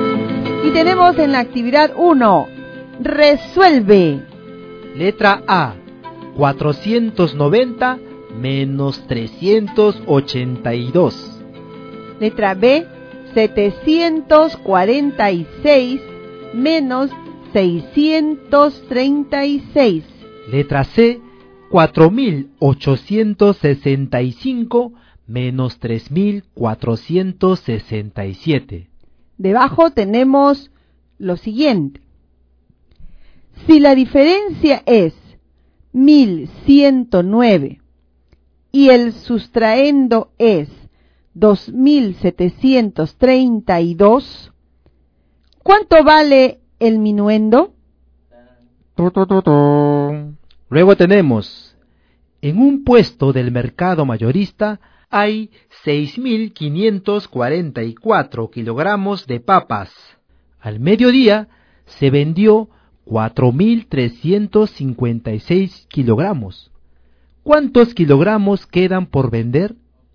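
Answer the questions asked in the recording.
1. 108
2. 110
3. 1398
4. 3841
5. 2188 kilogramos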